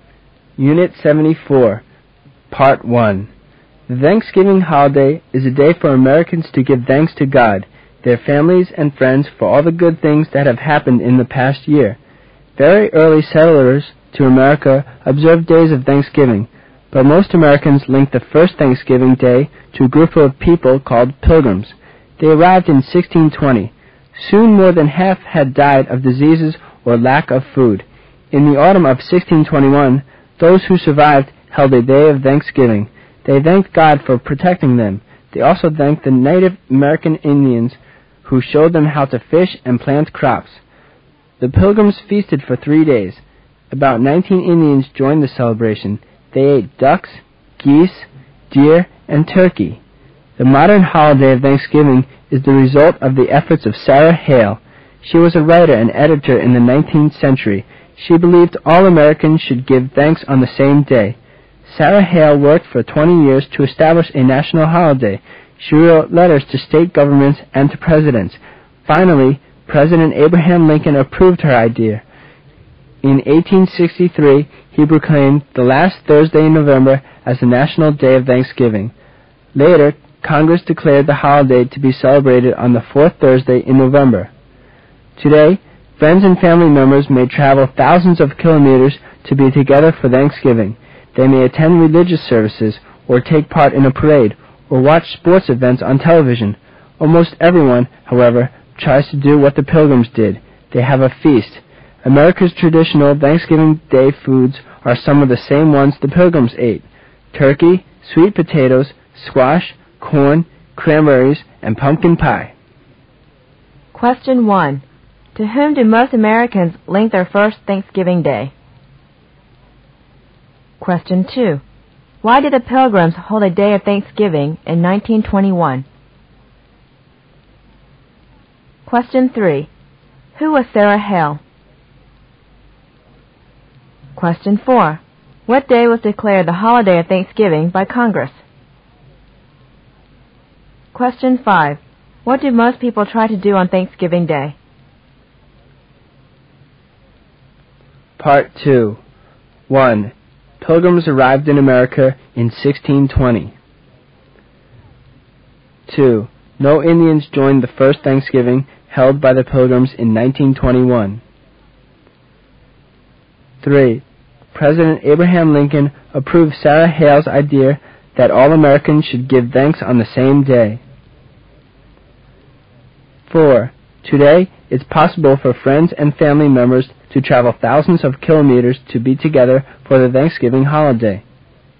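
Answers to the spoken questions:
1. The Pilgrims
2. To thank God for protecting them and the Indians for helping them
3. A 19th-century writer and editor
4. The fourth Thursday in November
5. Have a feast
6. True
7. False
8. True
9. True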